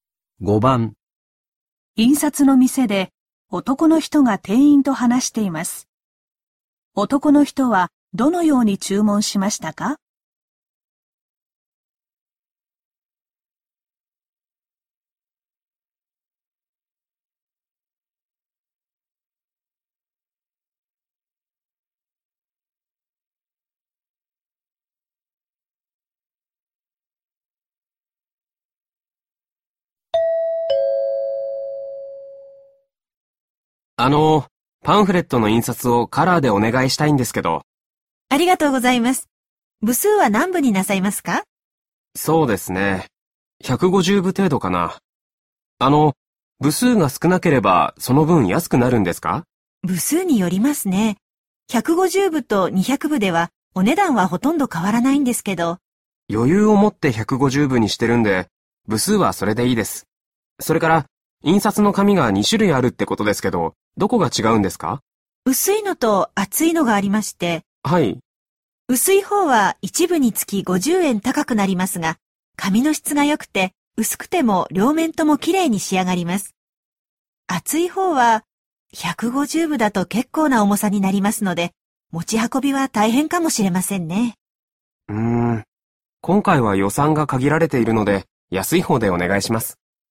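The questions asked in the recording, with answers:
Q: 男の人はどのように注文しましたか?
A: カラーで150部、安い厚い紙で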